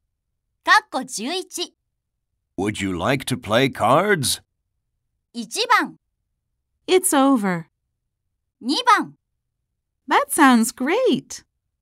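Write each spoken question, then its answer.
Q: Would you like to play cards?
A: 2: That sounds great.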